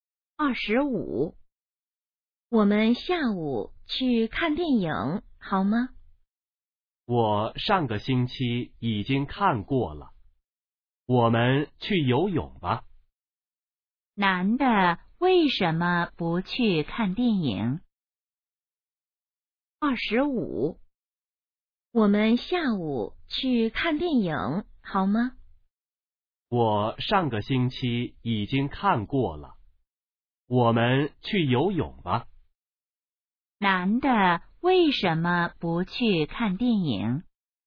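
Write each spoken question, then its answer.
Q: 男的为什么不去看电影?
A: 上个星期已经看过了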